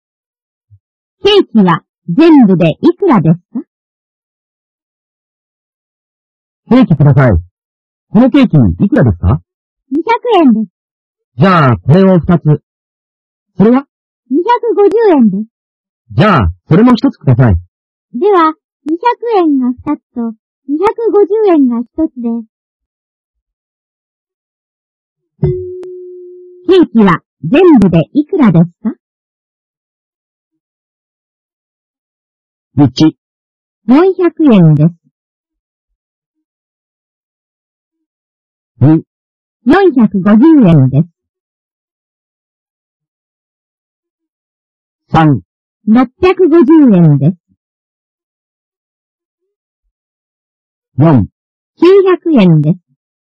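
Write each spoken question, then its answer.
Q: ケーキは全部でいくらですか?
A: 3: 650円です。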